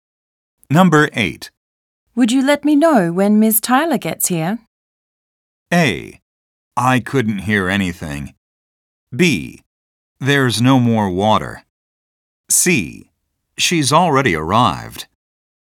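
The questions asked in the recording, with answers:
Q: Would you let me know when Ms. Tyler gets here?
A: C: She's already arrived.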